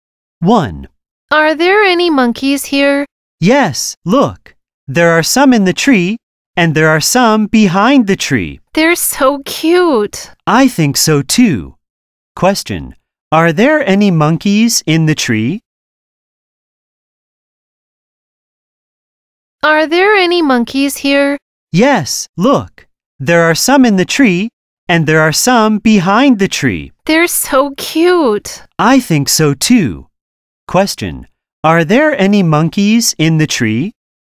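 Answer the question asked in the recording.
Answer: Yes, there are.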